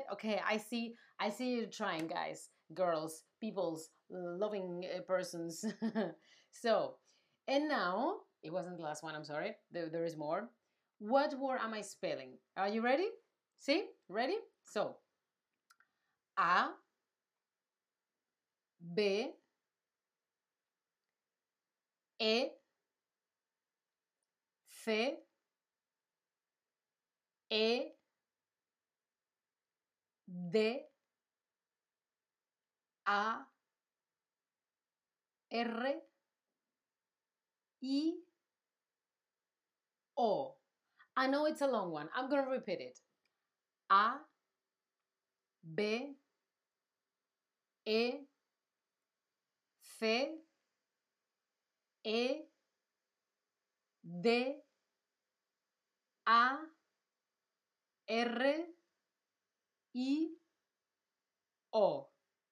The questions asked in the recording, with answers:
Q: What word am I spelling?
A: Yes, yes, abecedario, muy bien